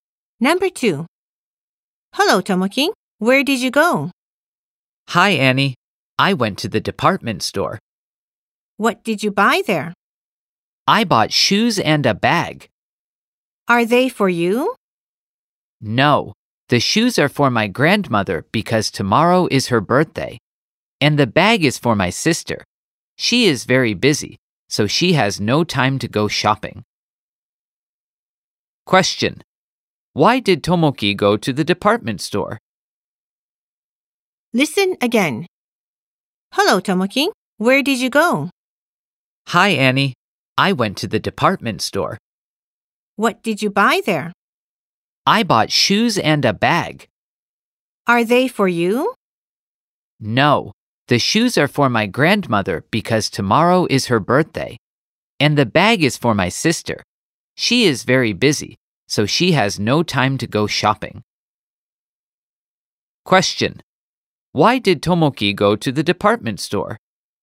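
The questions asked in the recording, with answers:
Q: Why did Tomoki go to the department store?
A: To buy shoes for his grandmother's birthday and a bag for his sister.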